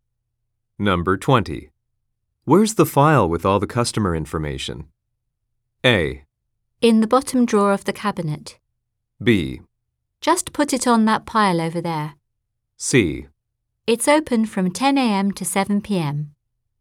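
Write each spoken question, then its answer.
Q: Where's the file with all the customer information?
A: A: In the bottom drawer of the cabinet.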